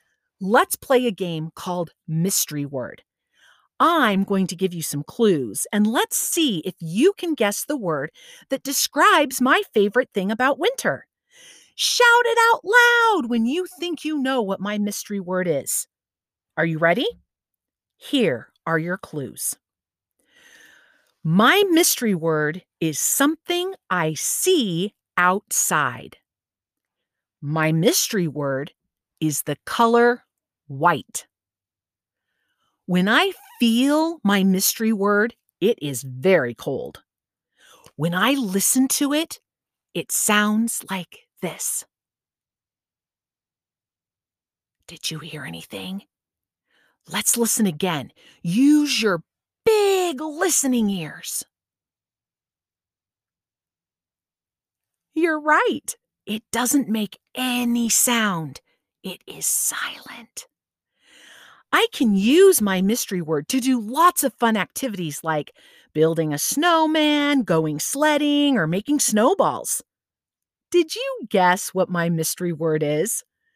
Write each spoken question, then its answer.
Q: Did you guess what my mystery word is?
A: Snow! Did you guess snow?